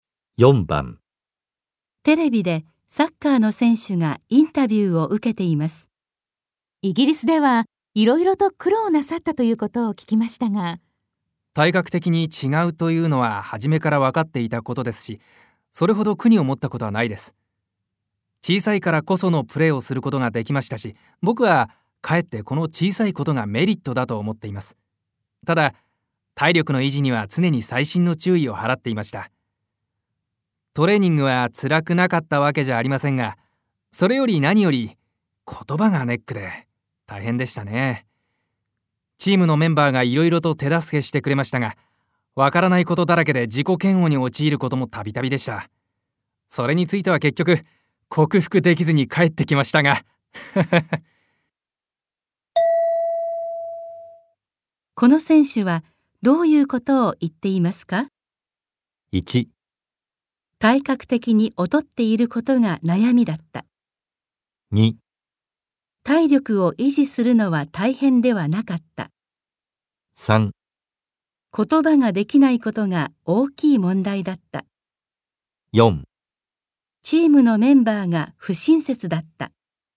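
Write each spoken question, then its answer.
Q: この選手はどういうことを言っていますか?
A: 3: 言葉ができないことが大きい問題だった。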